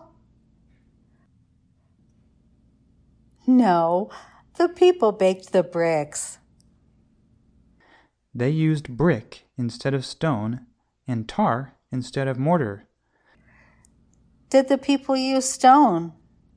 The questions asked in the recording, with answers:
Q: Did the people use stone?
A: No, the people used brick instead of stone.